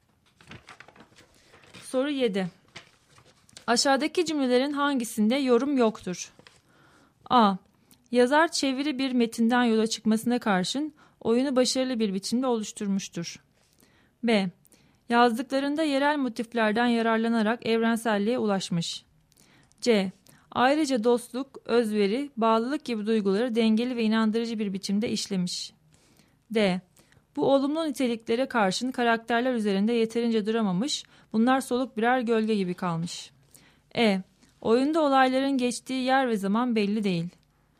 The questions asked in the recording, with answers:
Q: Aşağıdaki cümlelerin hangisinde yorum yoktur?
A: Doğru cevap E şıkkı.